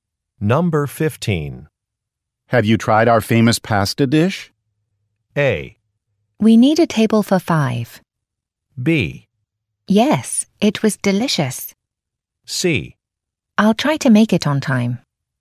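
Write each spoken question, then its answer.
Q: Have you tried our famous pasta dish?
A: B: Yes, it was delicious.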